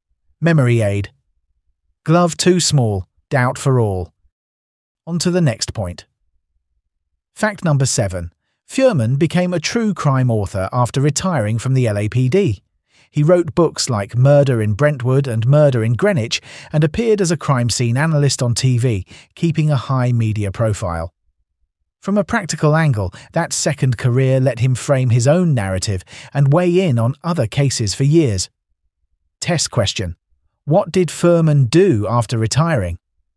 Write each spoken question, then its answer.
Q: What did Furman do after retiring?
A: Correct answer. Became a true crime author.